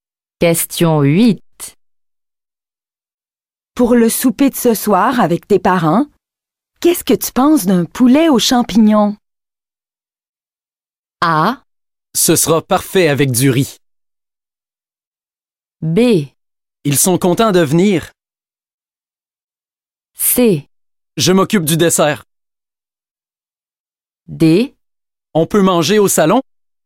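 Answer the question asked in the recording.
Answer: A: Ce sera parfait avec du riz.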